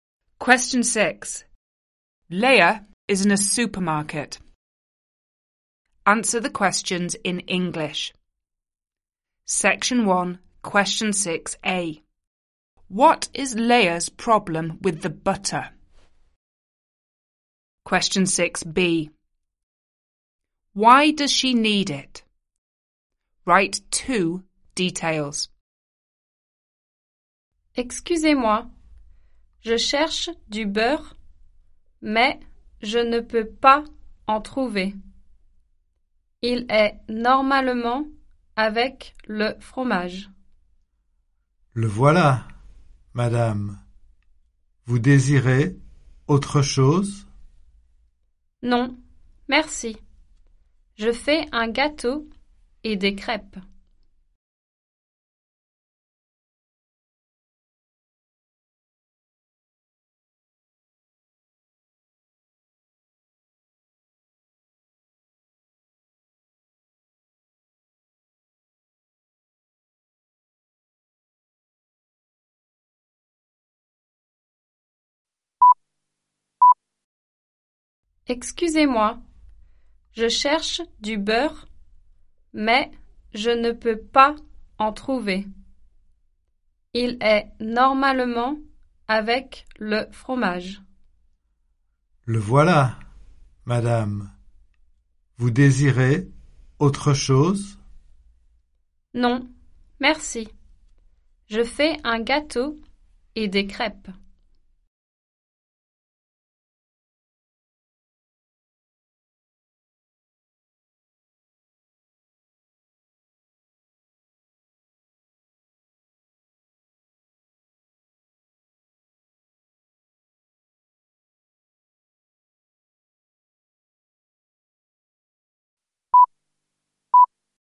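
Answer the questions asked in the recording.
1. She can't find it
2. She is making a cake and pancakes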